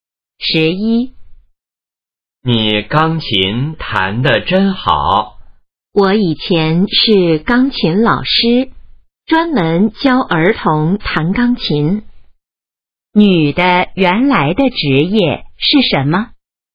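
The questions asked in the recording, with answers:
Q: 女的原来的职业是什么?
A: 钢琴老师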